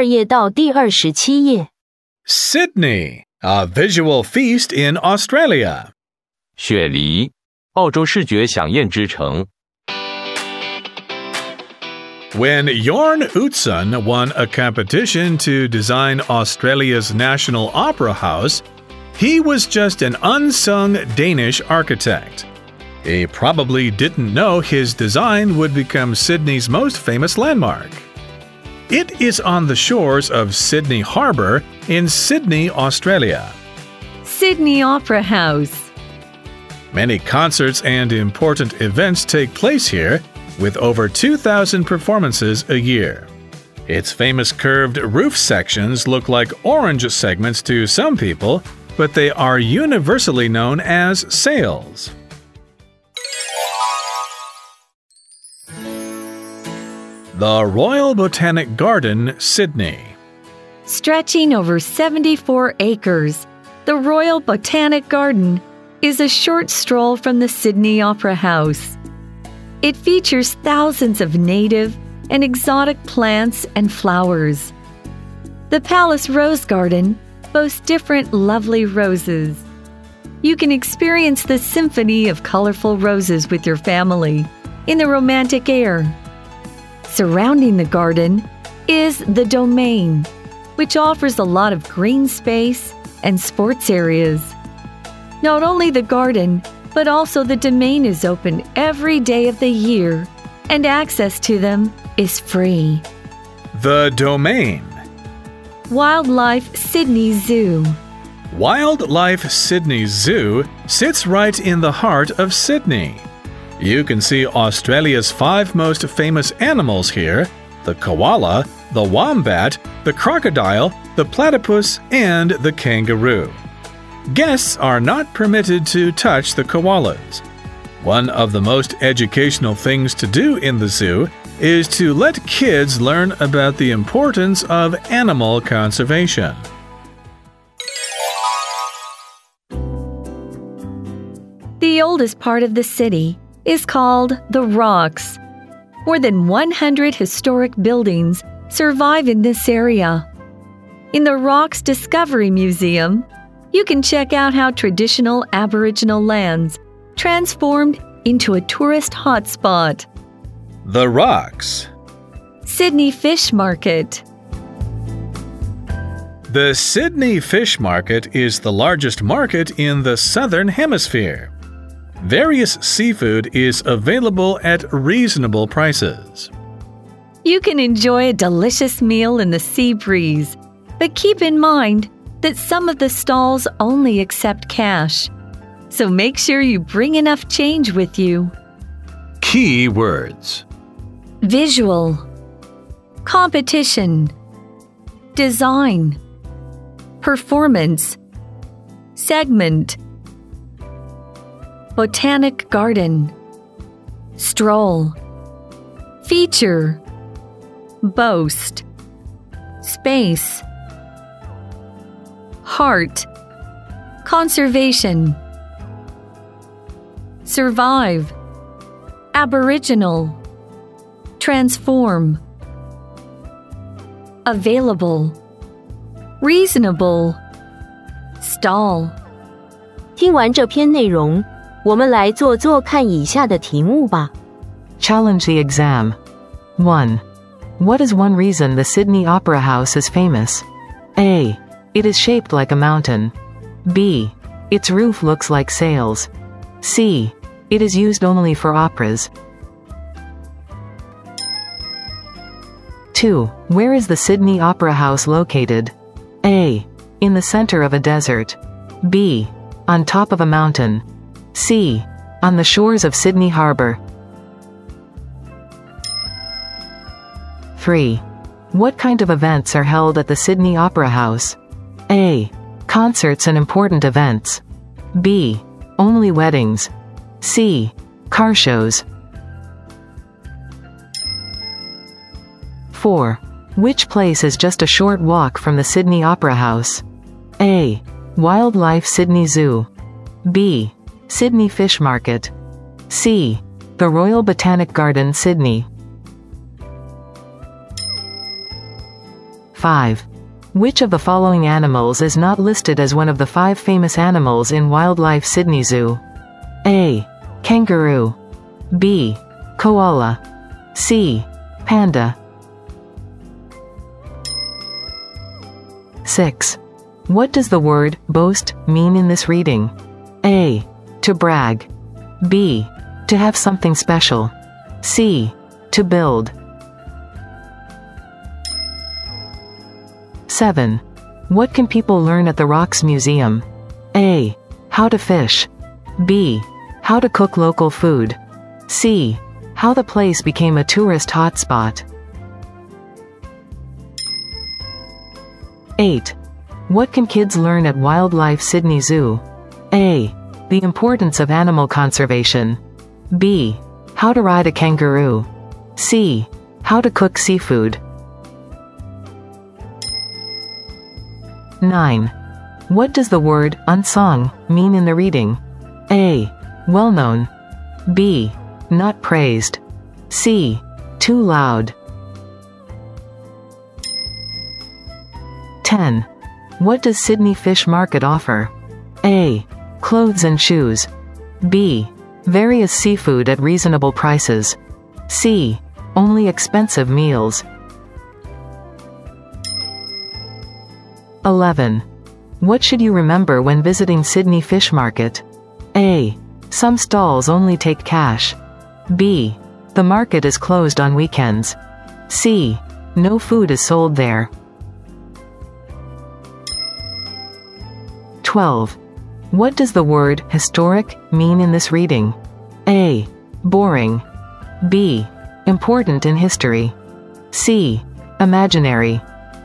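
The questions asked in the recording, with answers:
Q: What is one reason the Sydney Opera House is famous?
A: B: Its roof looks like sails.

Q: Where is the Sydney Opera House located?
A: C: On the shores of Sydney Harbour.

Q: What kind of events are held at the Sydney Opera House?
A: A: Concerts and important events.

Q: Which place is just a short walk from the Sydney Opera House?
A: C: The Royal Botanic Garden, Sydney.

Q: Which of the following animals is not listed as one of the five famous animals in Wildlife Sydney Zoo?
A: C: Panda.

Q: What does the word boast mean in this reading?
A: B: To have something special.

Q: What can people learn at the Rocks Museum?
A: C: How the place became a tourist hotspot.

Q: What can kids learn at Wildlife Sydney Zoo?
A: A: The importance of animal conservation.

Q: What does the word unsung mean in the reading?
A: B: Not praised.

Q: What does Sydney Fish Market offer?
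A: B: Various seafood at reasonable prices.

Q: What should you remember when visiting Sydney Fish Market?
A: A: Some stalls only take cash.

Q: What does the word historic mean in this reading?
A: B: Important in history.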